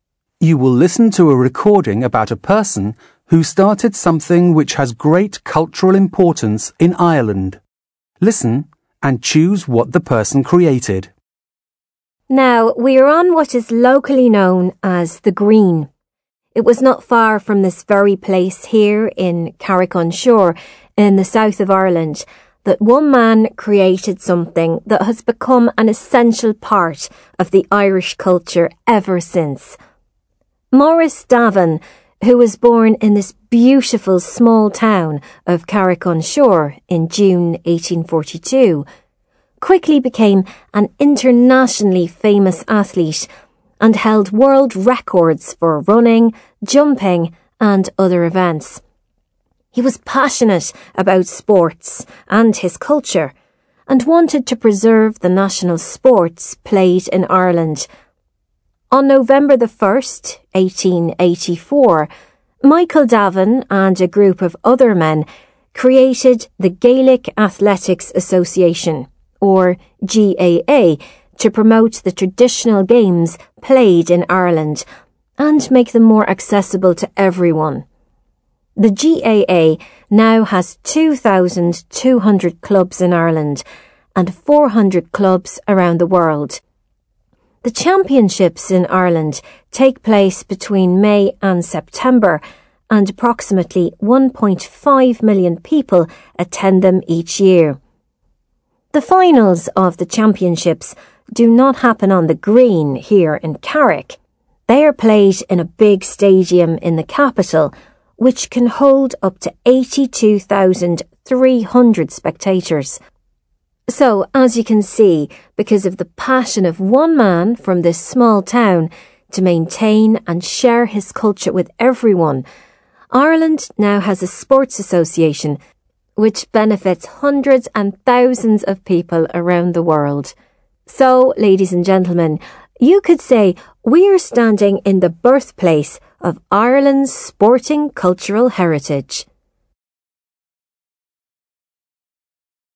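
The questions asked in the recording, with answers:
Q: Listen and choose what the person created.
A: The Gaelic Athletics Association (GAA)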